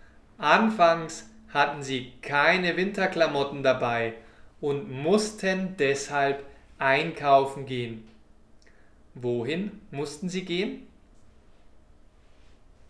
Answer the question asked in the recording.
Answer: Einkaufen. Sie mussten einkaufen gehen.